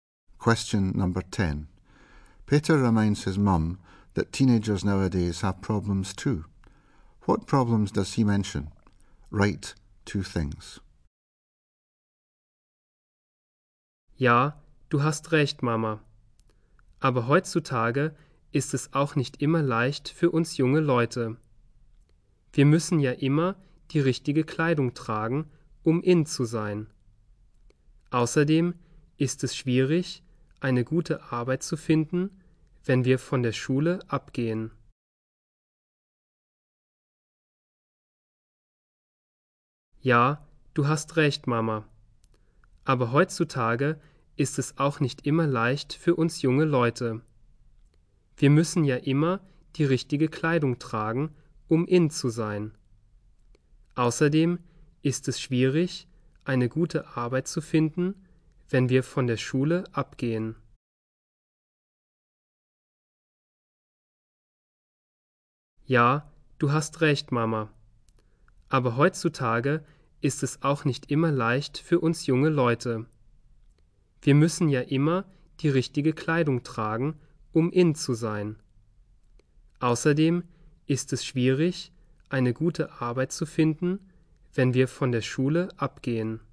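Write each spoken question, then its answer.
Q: What problems does he mention?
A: Must always wear the right clothes to be in; hard to find a good job after leaving school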